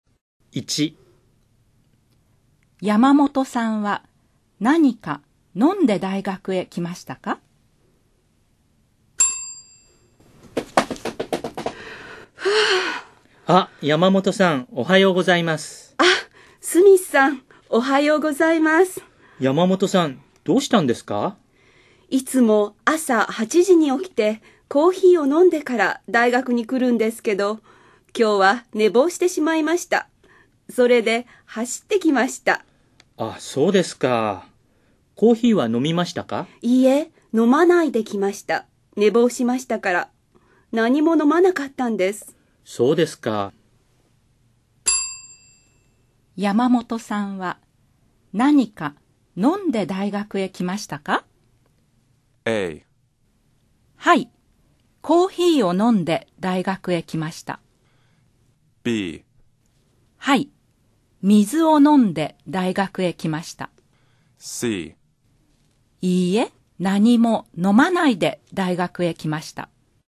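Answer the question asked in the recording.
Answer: C: いいえ、何も飲まないで大学へ来ました。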